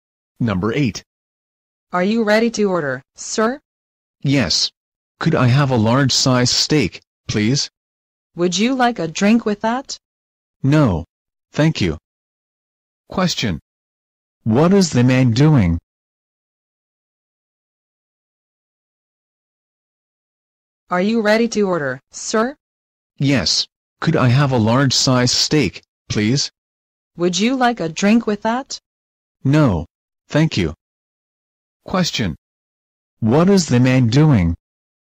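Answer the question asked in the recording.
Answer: Ordering food at a restaurant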